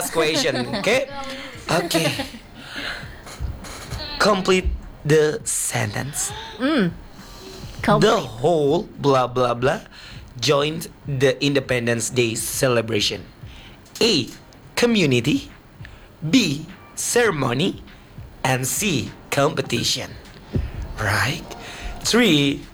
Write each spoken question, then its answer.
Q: Complete the sentence. The whole blah blah blah joined the Independence Day celebration.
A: A. Community.